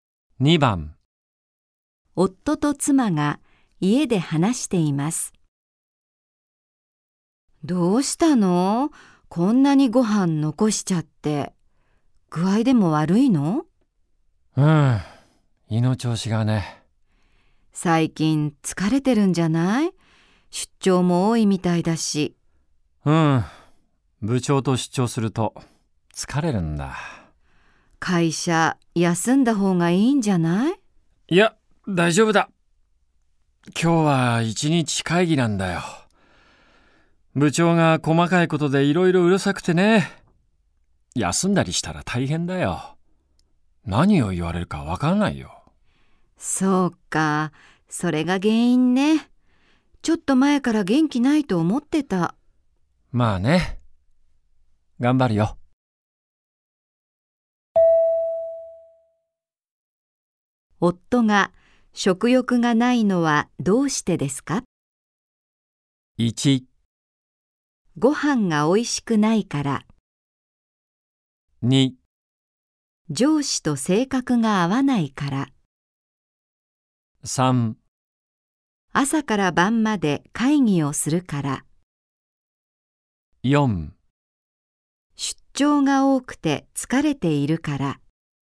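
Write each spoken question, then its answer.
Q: 夫が食欲がないのはどうしてですか?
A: 2: 上司と性格が合わないから。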